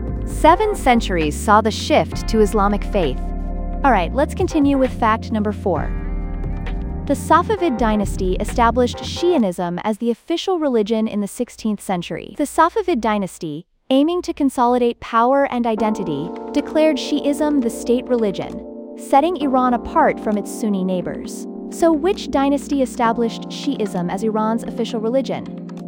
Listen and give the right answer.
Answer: Correct answer, Safavid dynasty.